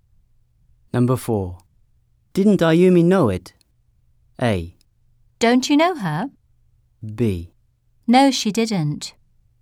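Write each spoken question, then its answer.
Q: Didn't Ayumi know it?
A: B: No, she didn't.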